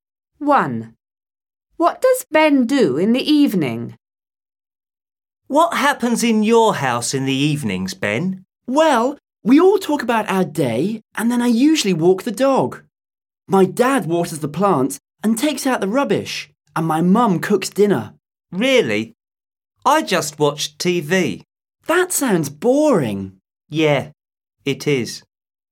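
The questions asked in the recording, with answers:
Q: What does Ben do in the evening?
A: He walks the dog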